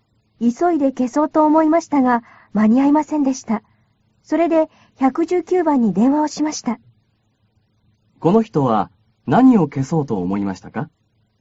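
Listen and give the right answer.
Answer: 火事(火)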